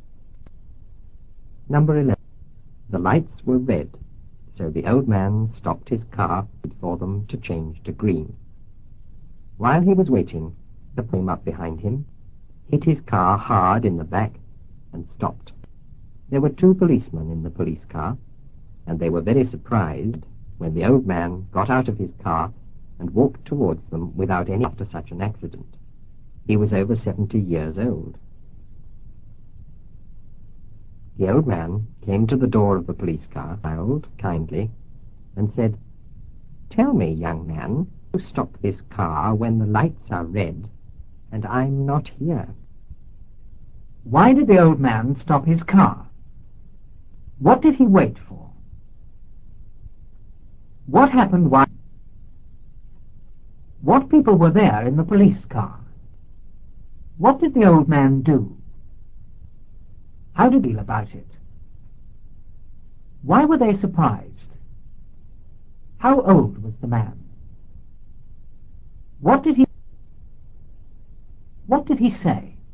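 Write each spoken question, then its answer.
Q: Why did the old man stop his car?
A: Because the lights were red

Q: What did he wait for?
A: For the lights to change to green

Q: What people were there in the police car?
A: Two policemen

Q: How old was the man?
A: Over 70 years old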